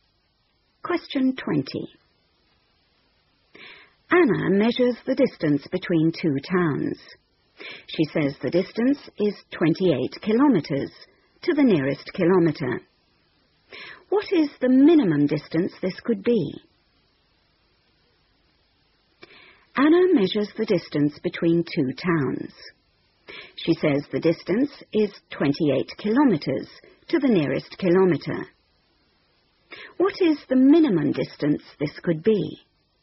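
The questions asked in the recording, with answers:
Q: What is the minimum distance this could be?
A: 27.5 km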